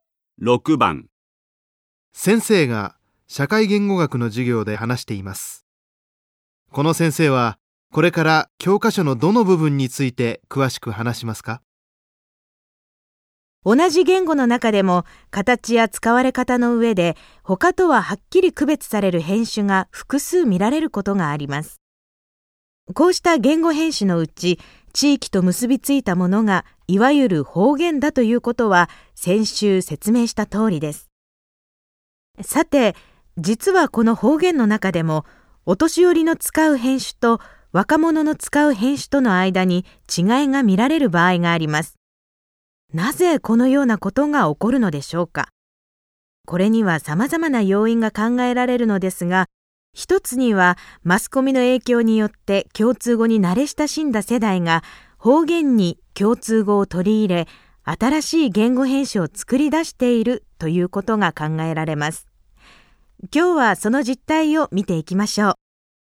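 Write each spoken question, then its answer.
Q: この先生はこれから教科書のどの部分について詳しく話しますか?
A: 方言の世代差(共通語の影響で若者が作り出した新しい言語変種)の部分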